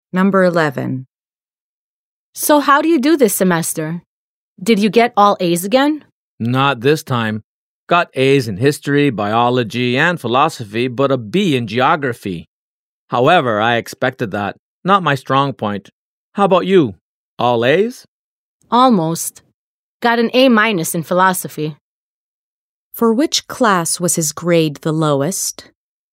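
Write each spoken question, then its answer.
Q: For which class was his grade the lowest?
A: Geography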